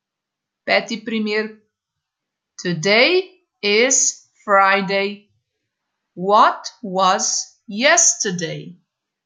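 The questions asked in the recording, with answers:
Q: What was yesterday?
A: Thursday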